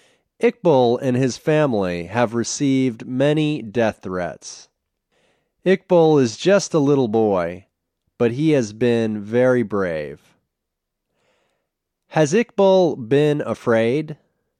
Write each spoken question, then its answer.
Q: Has Iqbal been afraid?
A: No, he hasn't been afraid.